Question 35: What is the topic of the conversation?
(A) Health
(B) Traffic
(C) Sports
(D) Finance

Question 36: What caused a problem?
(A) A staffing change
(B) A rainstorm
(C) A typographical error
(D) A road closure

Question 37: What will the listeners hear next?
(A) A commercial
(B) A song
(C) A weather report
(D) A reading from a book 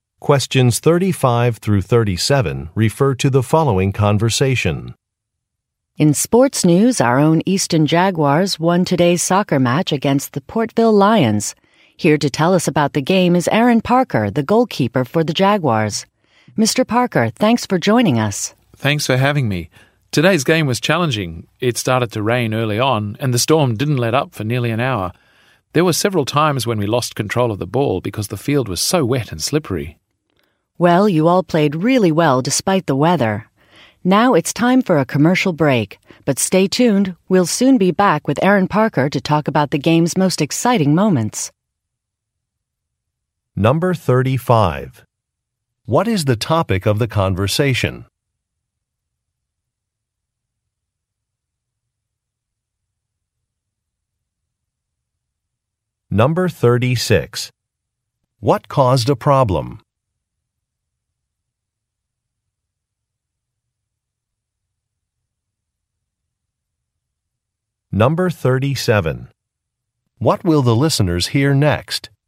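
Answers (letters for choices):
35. C
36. B
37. A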